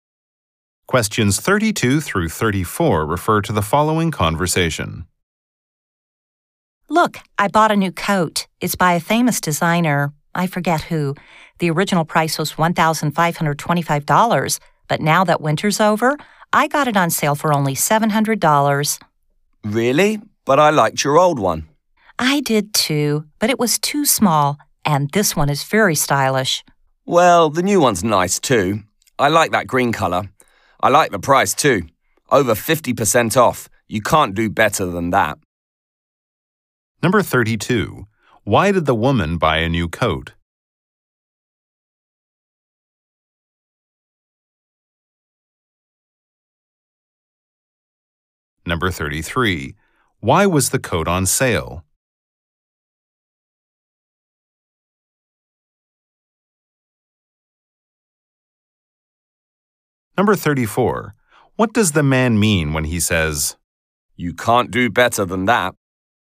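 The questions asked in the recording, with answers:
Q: Why did the woman buy a new coat?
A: Her old one was too small.

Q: Why was the coat on sale?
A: Because winter is over.

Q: What does the man mean when he says,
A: It is a very good price.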